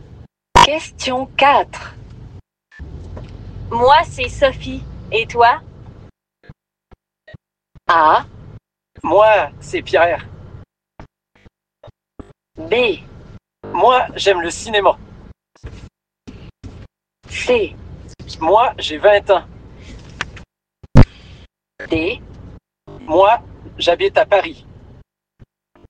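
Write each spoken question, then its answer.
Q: Moi, c'est Sophie. Et toi?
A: A: Moi, c'est Pierre.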